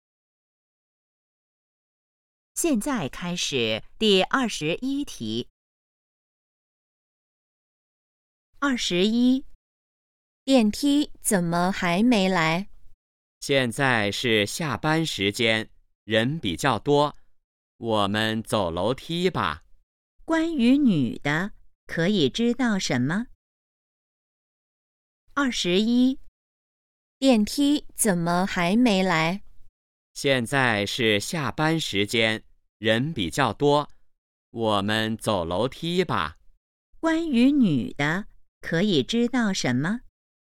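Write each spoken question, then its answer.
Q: 关于女的,可以知道什么?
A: 她想走楼梯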